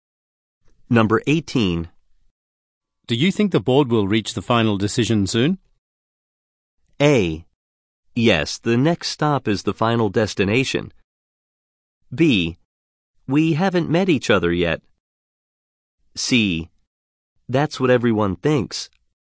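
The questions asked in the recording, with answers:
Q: Do you think the board will reach the final decision soon?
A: C: That's what everyone thinks.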